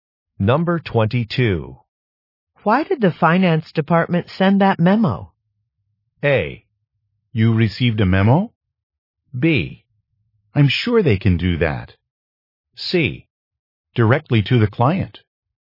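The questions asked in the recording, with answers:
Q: Why did the finance department send that memo?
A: A: You received a memo?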